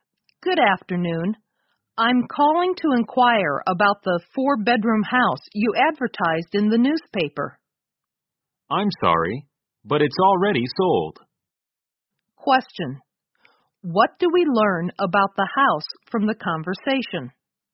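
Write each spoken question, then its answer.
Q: What do we learn about the house from the conversation?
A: It has already been sold.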